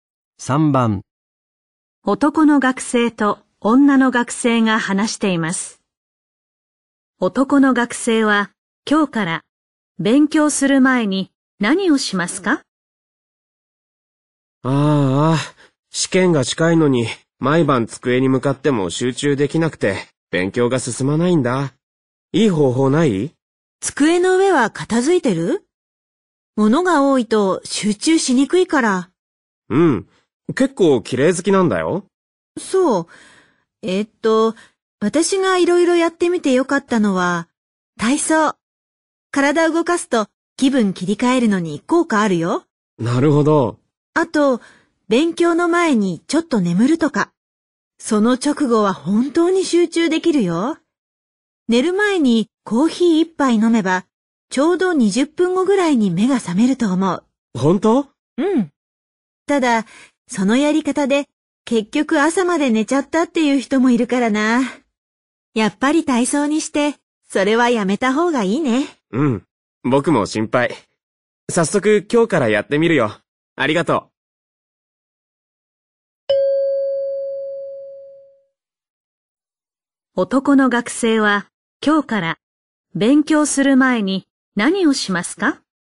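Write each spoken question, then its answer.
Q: 男の学生は今日から勉強する前に何をしますか?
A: 体操をする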